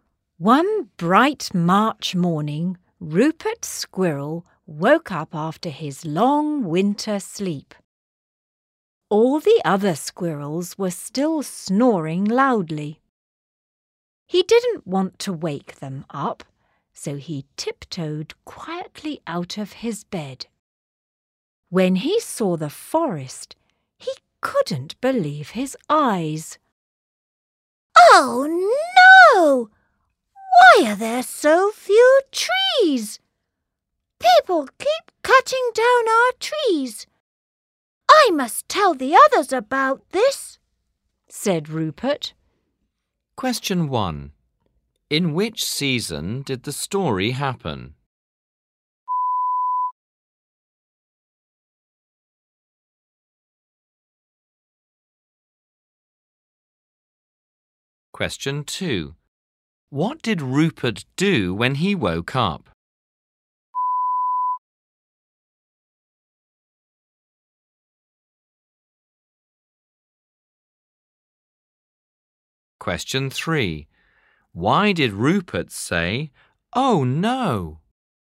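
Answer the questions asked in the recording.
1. Spring (March)
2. He tiptoed quietly out of his bed
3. There were so few trees because people kept cutting them down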